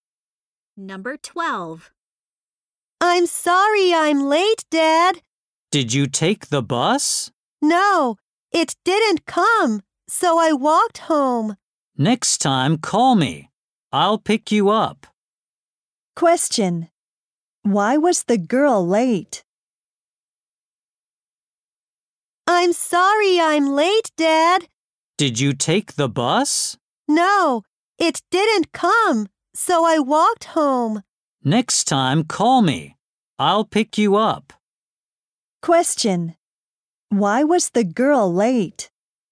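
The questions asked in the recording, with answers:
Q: Why was the girl late?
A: The bus didn't come, so she walked home.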